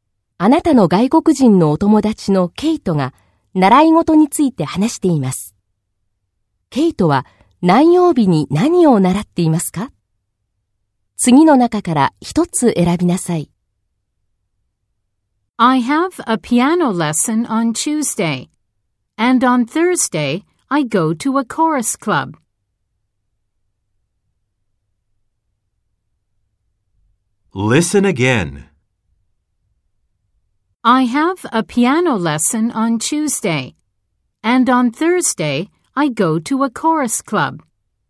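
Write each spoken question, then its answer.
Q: ケイトは何曜日に何を習っていますか?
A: 火曜日にピアノ、木曜日に合唱クラブ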